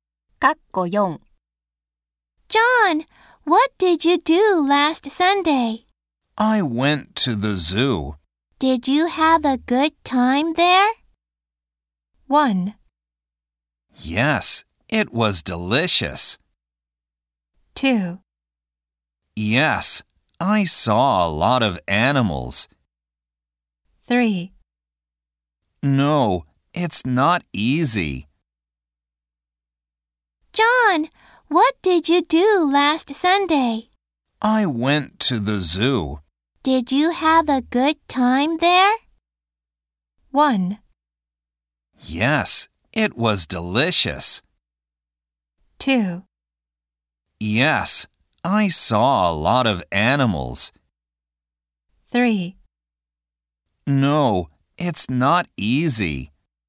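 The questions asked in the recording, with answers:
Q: Did you have a good time there?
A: 2: Yes, I saw a lot of animals.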